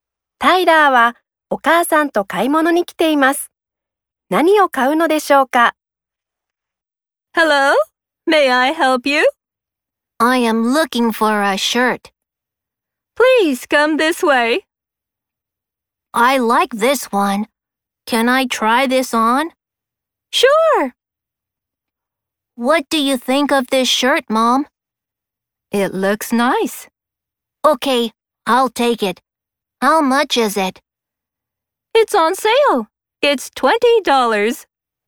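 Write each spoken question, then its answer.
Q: 何を買うのでしょうか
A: シャツ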